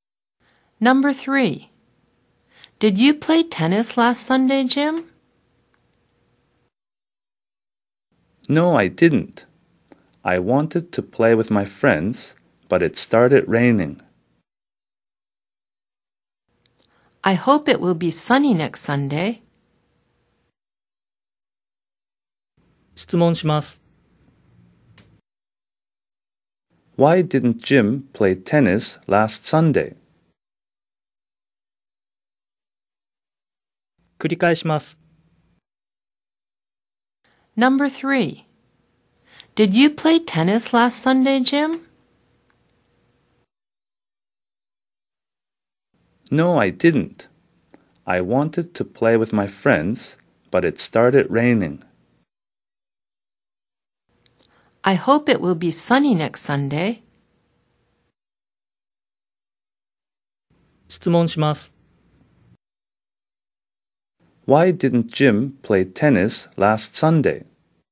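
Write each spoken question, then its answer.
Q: Why didn't Jim play tennis last Sunday?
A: Because it started raining.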